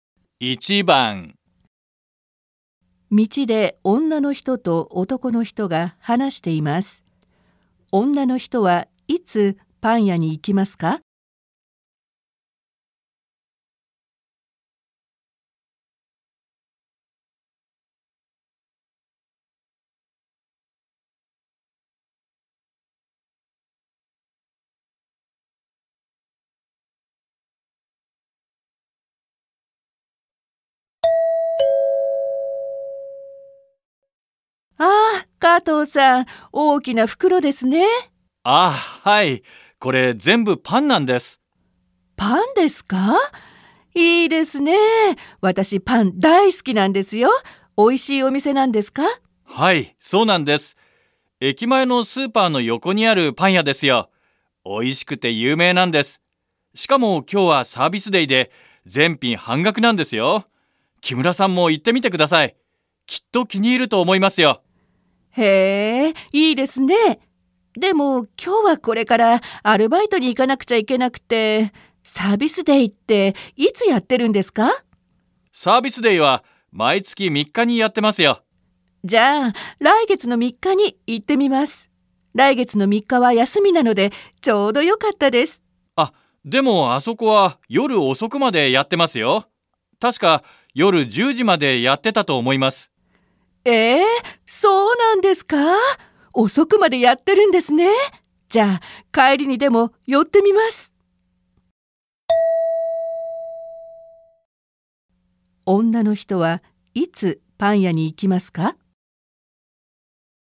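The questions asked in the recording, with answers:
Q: 女の人はいつパン屋に行きますか?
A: 今日のアルバイトの帰り

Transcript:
F:あ、加藤さん、大きな袋ですね。/ A, Kato, cái túi to nhỉ.
M:あ、はい。これ、全部パンなんです。/ À, vâng, tất cả đều là bánh mì.
F:パンですか。いいですね。私、パン大好きなんですよ。おいしいお店なんですか。
M:はい、そうなんです。駅前のスーパーの横にあるパン屋ですよ。おいしくて有名なんです。しかも、今日はサービスディで全品半額なんですよ。木村さんも行ってみてください。きっと気に入ると思いますよ。
でも、今日はこれからアルバイトに行かなくちゃいけなくて。サービスディっていつやってるんですか。
F:じゃ、来月3日に行ってみます。来月の3日は休みなのでちょうどよかったです。
M:あ、でも、あそこは夜遅くまでやってますよ。確か、夜10時までやってたと思います。
じゃ、帰りにでも寄ってみます。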